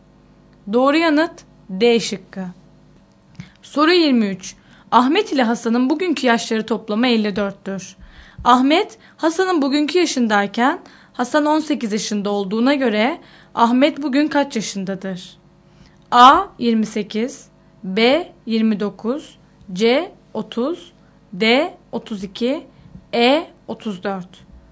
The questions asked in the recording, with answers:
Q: Ahmet, Hasan'ın bugünkü yaşındayken Hasan 18 yaşında olduğuna göre Ahmet bugün kaç yaşındadır?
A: Doğru yanıt C şıkkı.